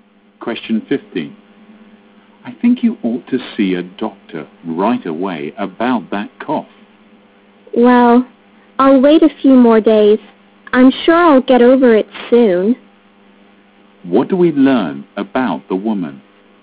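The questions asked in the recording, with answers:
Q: What do we learn about the woman?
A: She doesn't think her cough is serious and won't see a doctor yet.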